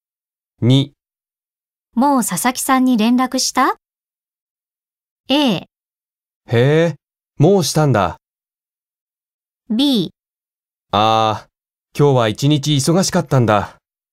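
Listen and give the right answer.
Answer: B: ああ、今日は一日忙しかったんだ。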